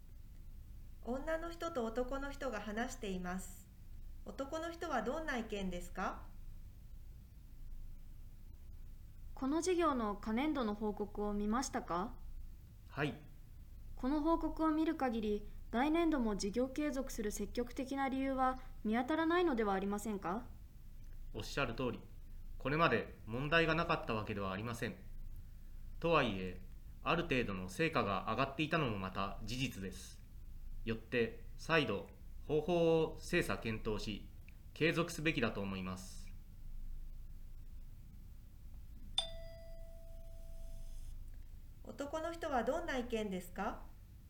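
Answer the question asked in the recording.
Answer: 方法を再度精査検討し、事業を継続すべきだ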